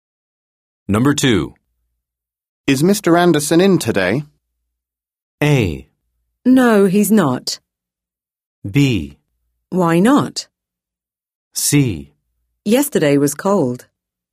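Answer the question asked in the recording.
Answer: A: No, he's not.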